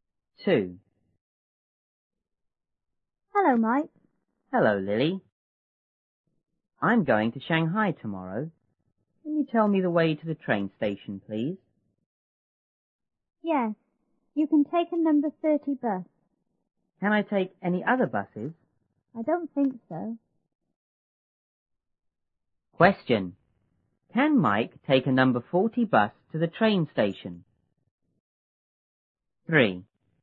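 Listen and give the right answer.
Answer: No, he can't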